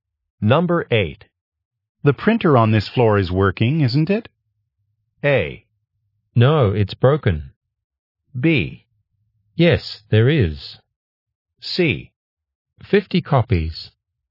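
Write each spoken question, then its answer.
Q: The printer on this floor is working, isn't it?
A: A: No, it's broken.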